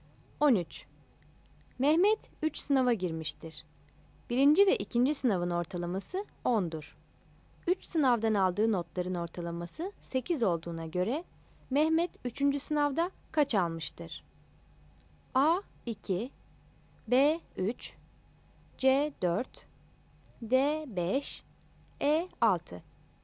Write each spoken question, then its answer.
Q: 3 sınavdan aldığı notların ortalaması 8 olduğuna göre Mehmet 3.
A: Yanıt C'dir.